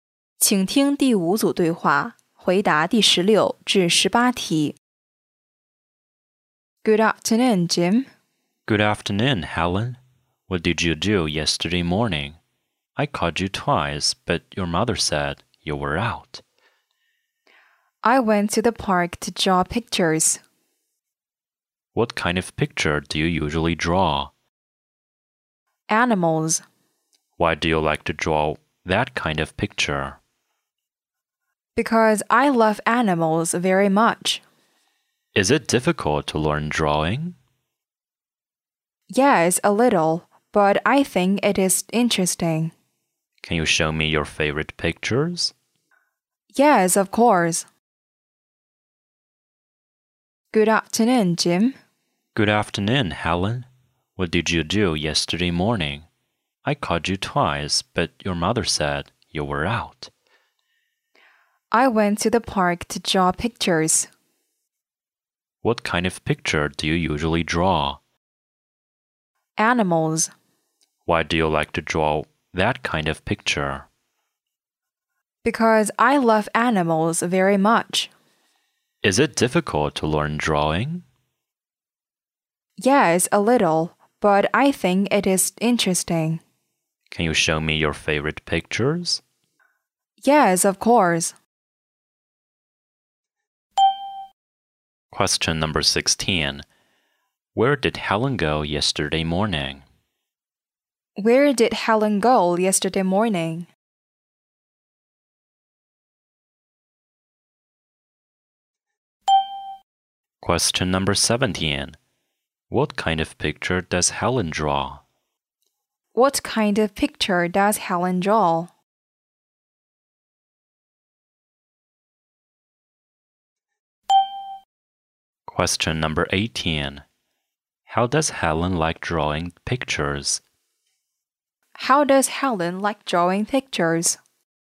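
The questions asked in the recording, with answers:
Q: Where did Helen go yesterday morning?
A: To the park

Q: What kind of picture does Helen draw?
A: Animals

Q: How does Helen like drawing pictures?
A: She thinks it is interesting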